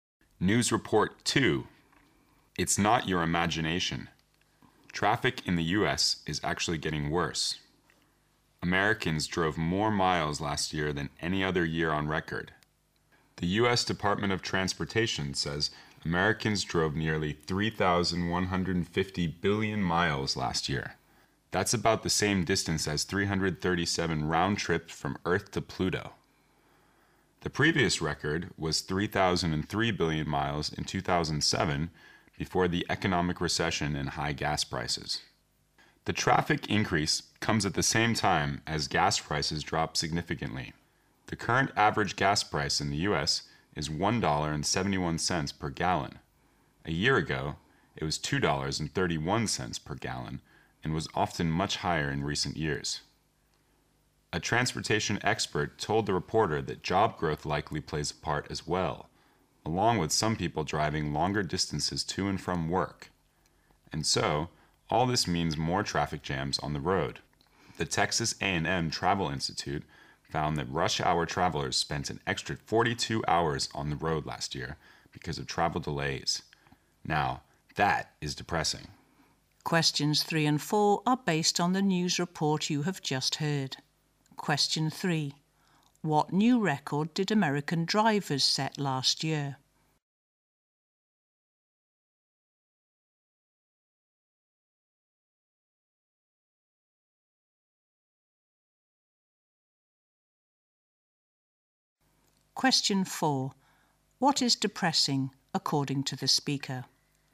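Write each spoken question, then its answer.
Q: What new record did American drivers set last year?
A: They drove more miles than in any other year (nearly 3,150 billion miles)

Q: What is depressing, according to the speaker?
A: Rush hour travelers spent an extra 42 hours on the road because of delays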